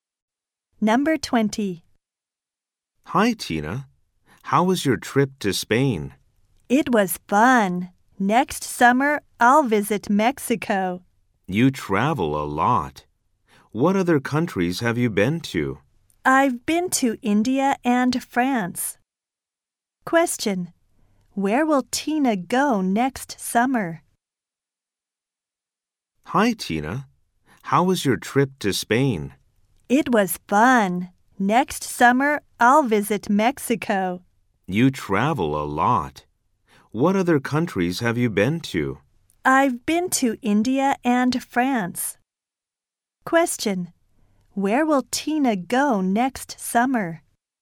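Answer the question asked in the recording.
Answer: Mexico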